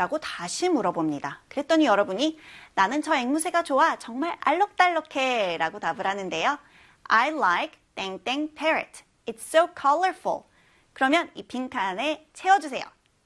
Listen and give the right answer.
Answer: That parrot.